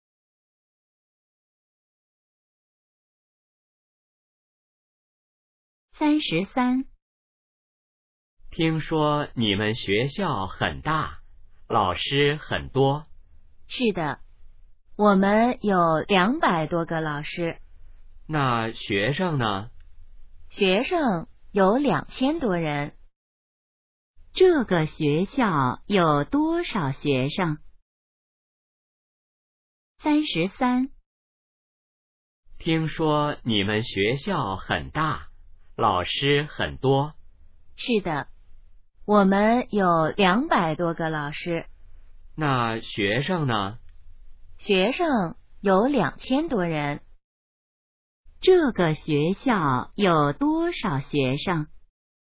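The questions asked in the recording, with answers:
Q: 这个学校有多少学生?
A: 2000多人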